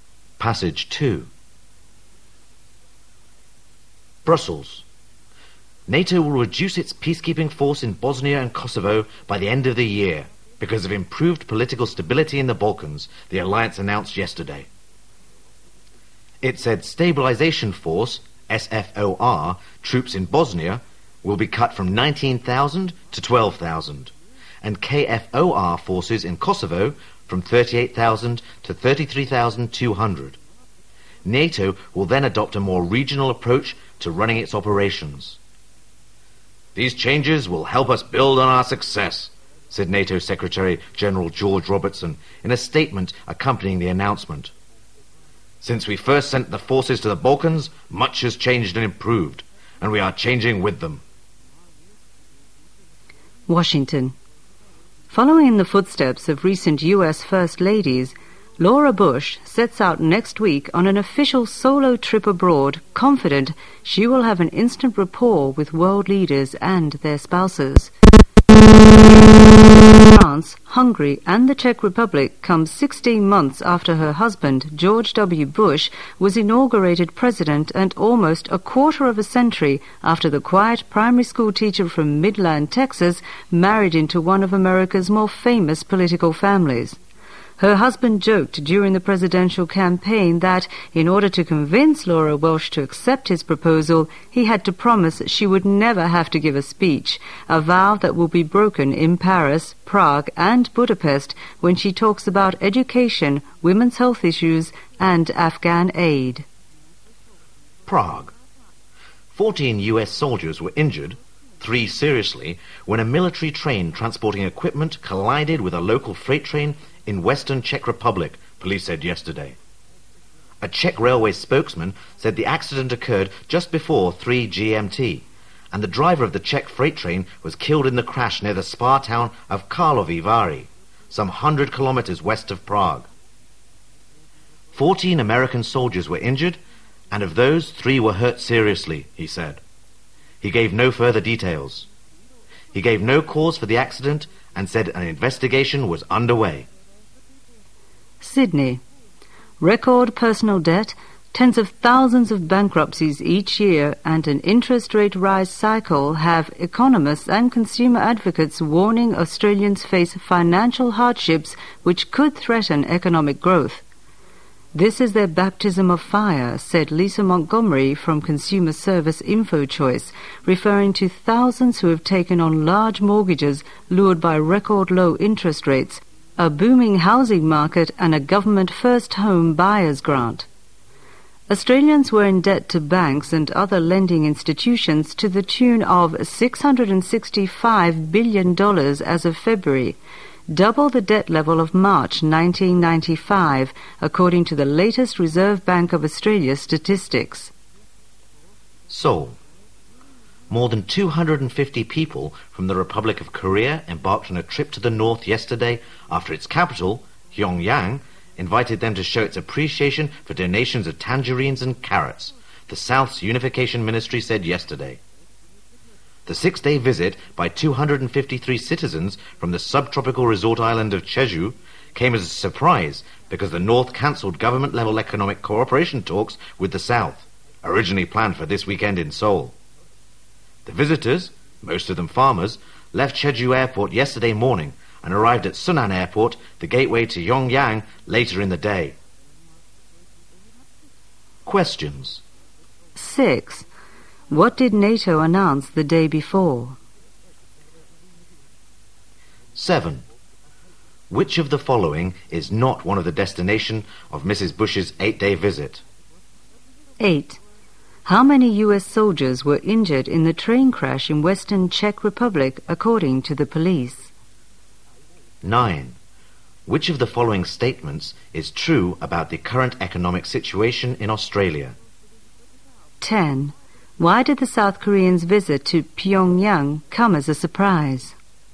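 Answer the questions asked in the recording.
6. It will reduce its peacekeeping force in Bosnia and Kosovo
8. 14
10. Because the North had cancelled government-level economic cooperation talks with the South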